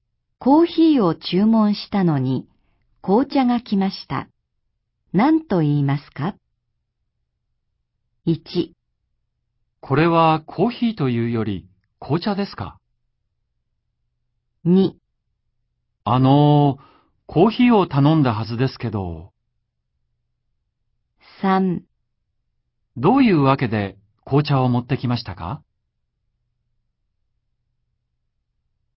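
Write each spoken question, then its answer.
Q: コーヒーを注文したのに紅茶が来ました。何と言いますか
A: 2: コーヒーを頼んだはずですけど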